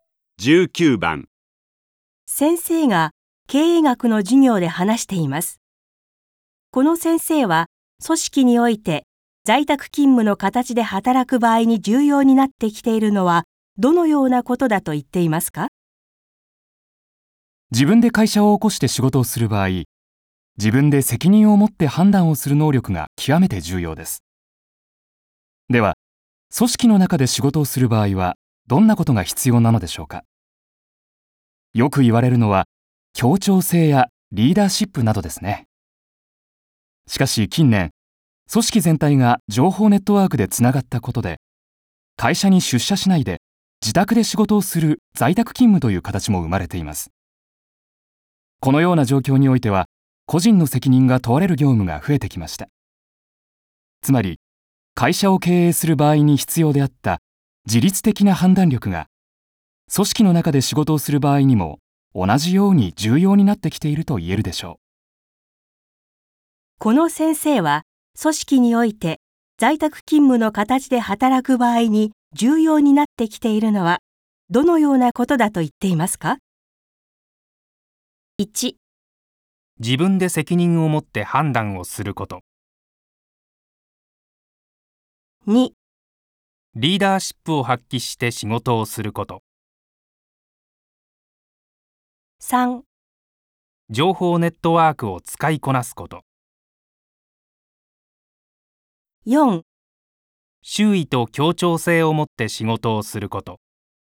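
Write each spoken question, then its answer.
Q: この先生は、組織において在宅勤務の形で働く場合に重要になってきているのはどのようなことだと言っていますか?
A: 1: 自分で責任を持って判断をすること。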